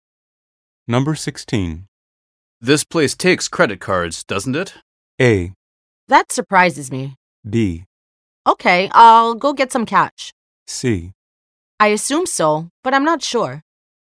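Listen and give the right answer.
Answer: C: I assume so, but I'm not sure.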